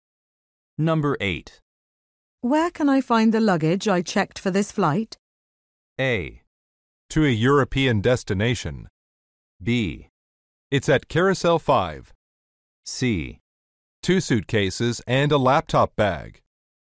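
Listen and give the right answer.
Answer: B: It's at Carousel 5.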